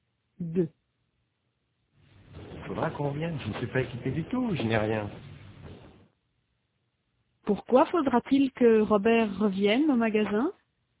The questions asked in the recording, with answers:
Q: Pourquoi faudra-t-il que Robert revienne au magasin?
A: Parce qu'il n'est pas équipé du tout, il n'a rien.